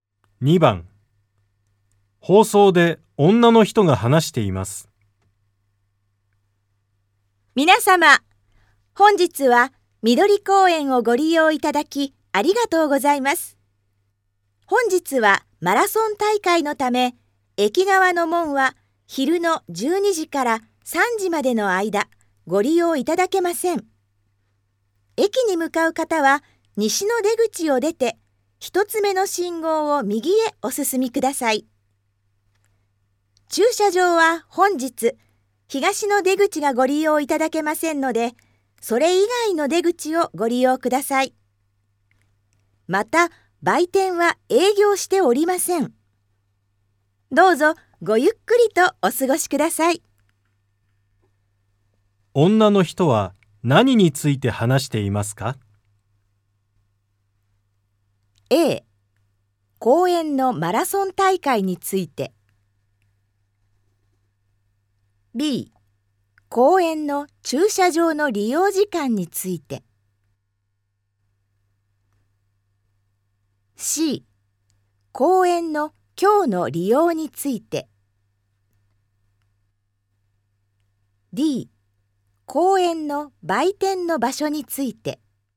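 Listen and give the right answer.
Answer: C: 公園の今日の利用について。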